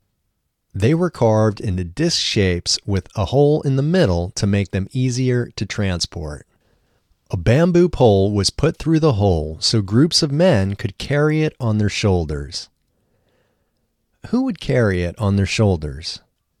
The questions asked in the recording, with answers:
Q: Who would carry it on their shoulders?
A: Groups of men would carry it on their shoulders.